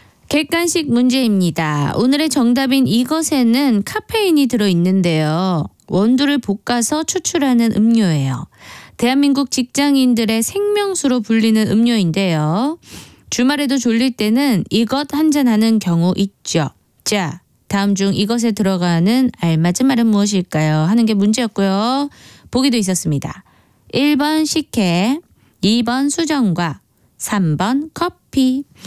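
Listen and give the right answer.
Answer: 3: 커피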